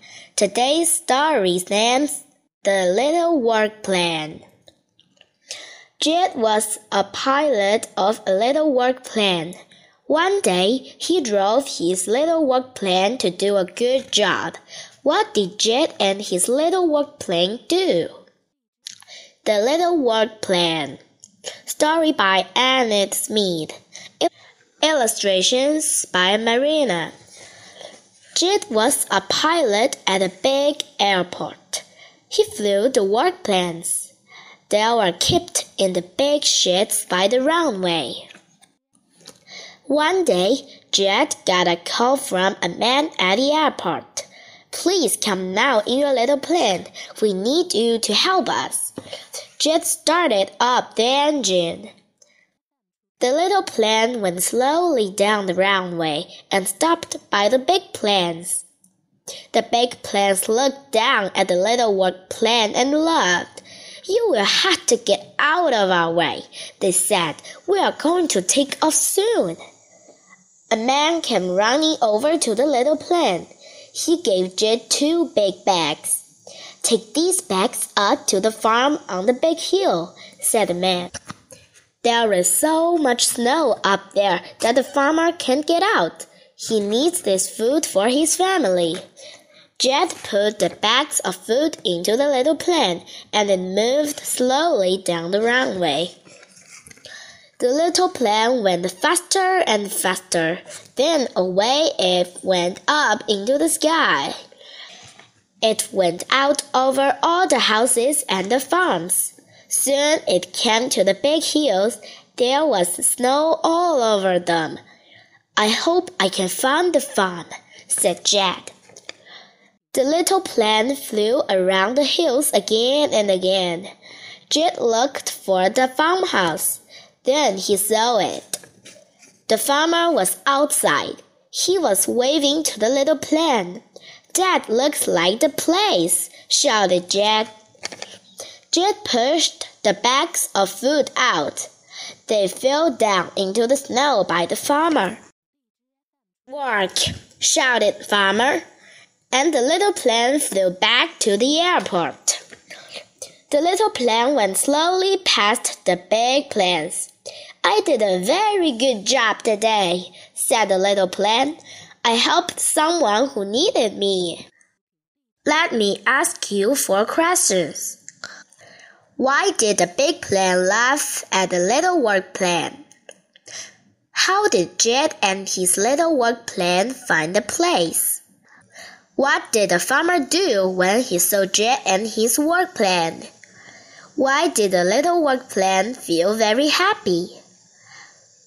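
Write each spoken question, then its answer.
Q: What did Jed and his little work plane do?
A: They flew food to a farmer on a snowy hill.

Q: How did Jed and his little work plan find a place?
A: They flew around the hills again and again until Jed saw the farmhouse.

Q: What did the farmer do when he saw Jed and his work plan?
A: He waved to the little plane.

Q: Why did the little work plan feel very happy?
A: Because it helped someone who needed it.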